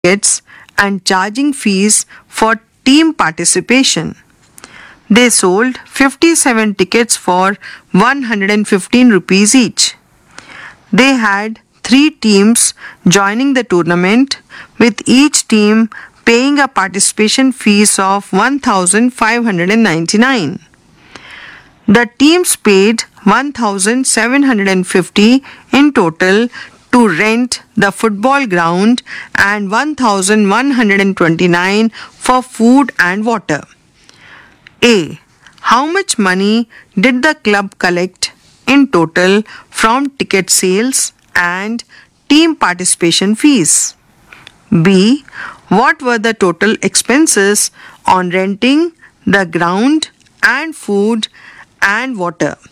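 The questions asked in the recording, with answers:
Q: What were the total expenses on renting the ground and food and water?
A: 2879 rupees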